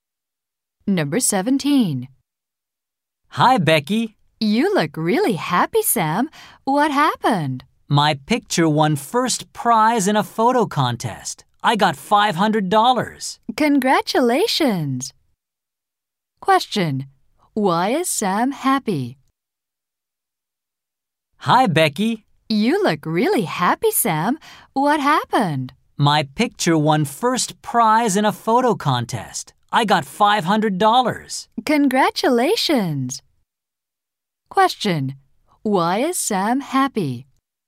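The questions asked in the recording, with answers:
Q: Why is Sam happy?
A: His picture won first prize in a photo contest.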